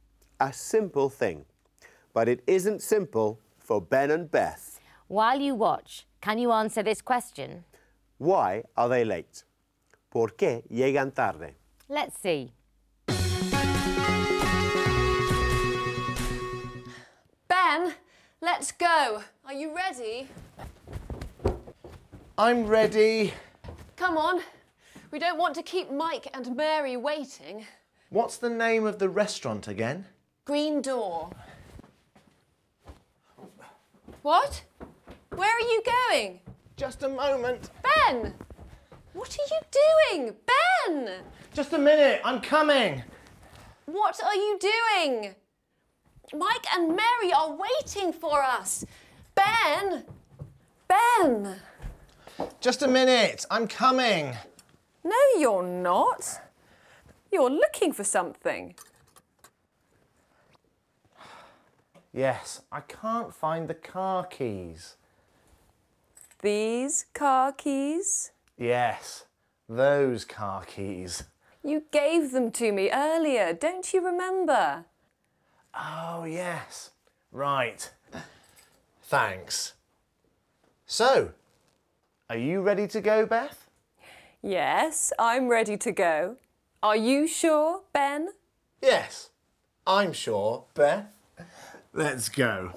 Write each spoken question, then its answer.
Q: Why are they late?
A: So, they are late because Ben can't find the car keys and Beth is getting impatient.